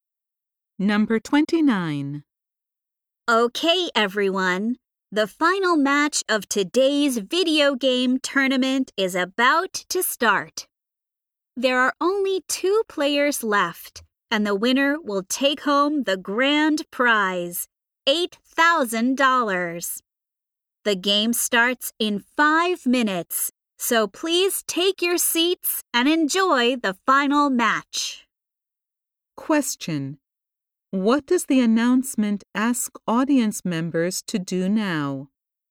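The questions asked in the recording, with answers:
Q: What does the announcement ask audience members to do now?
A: Take their seats.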